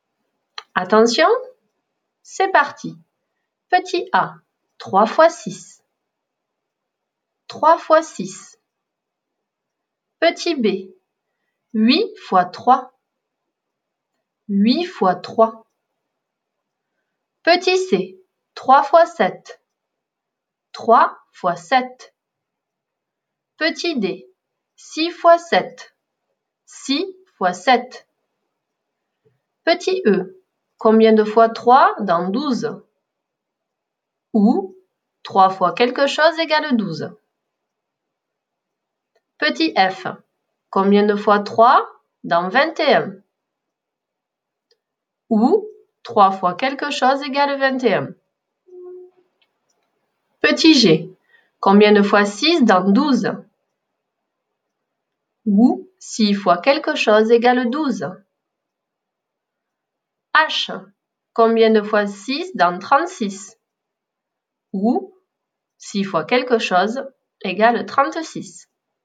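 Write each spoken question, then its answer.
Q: 3 fois 6.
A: 18

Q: 8 fois 3.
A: 24

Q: 3 fois 7.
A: 21

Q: 6 fois 7.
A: 42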